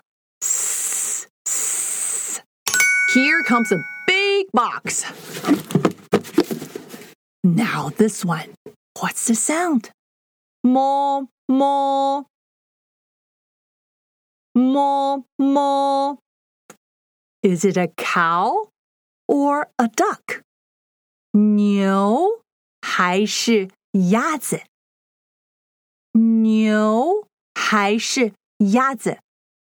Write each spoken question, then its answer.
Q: Is it a cow or a duck?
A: A cow